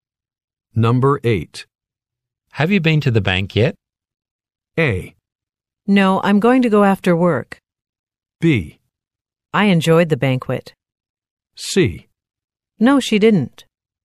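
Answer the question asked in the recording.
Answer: A: No, I'm going to go after work.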